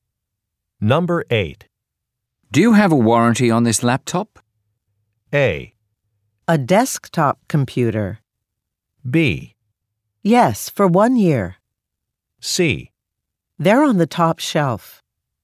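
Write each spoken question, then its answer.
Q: Do you have a warranty on this laptop?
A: B: Yes, for 1 year.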